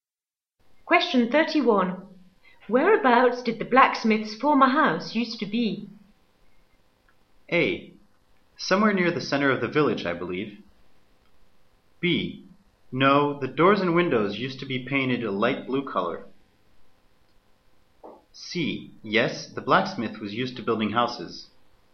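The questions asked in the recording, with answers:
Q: Whereabouts did the blacksmith's former house used to be?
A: A: Somewhere near the center of the village, I believe.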